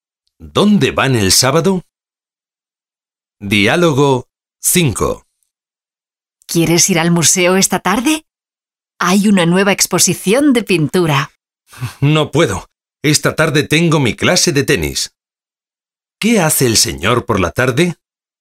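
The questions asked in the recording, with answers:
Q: ¿Qué hace el señor por la tarde?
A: Tiene clase de tenis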